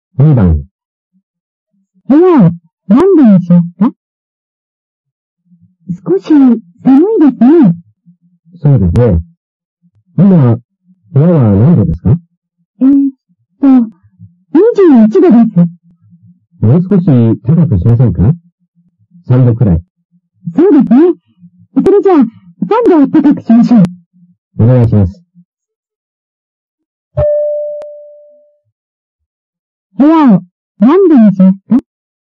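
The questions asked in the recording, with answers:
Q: 部屋を何度にしますか?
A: 24度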